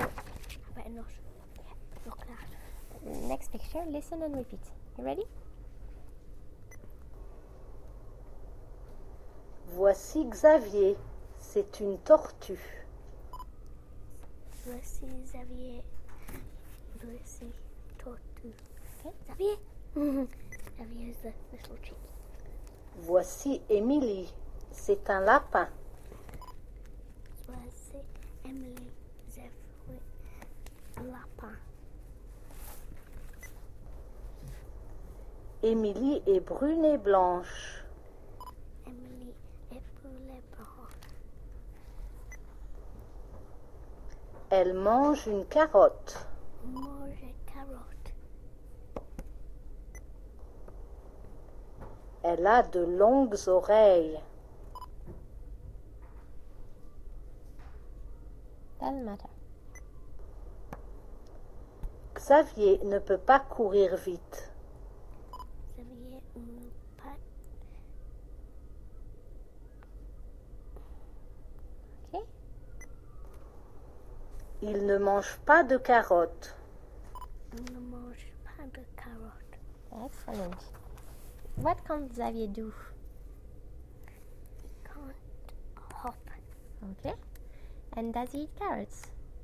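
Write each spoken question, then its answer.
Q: And does he eat carrots?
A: No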